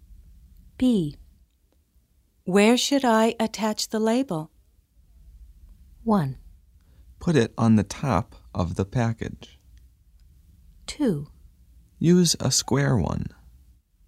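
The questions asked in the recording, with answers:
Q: Where should I attach the label?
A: 1: Put it on the top of the package.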